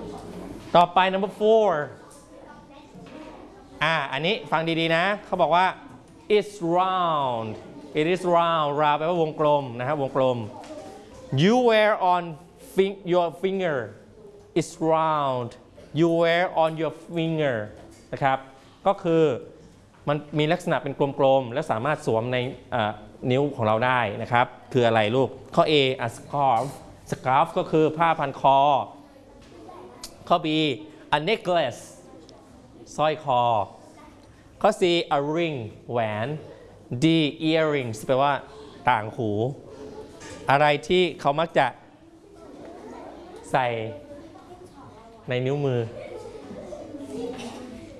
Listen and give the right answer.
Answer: yes, number C.